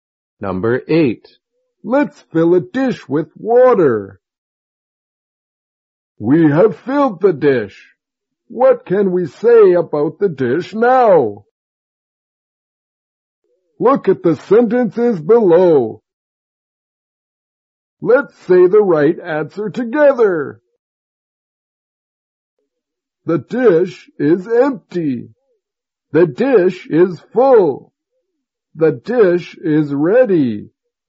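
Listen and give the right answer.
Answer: The dish is full.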